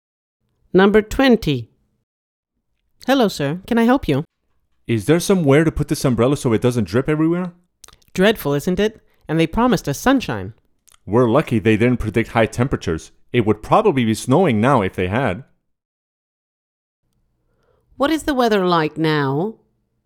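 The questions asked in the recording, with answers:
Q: What is the weather like now?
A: Rainy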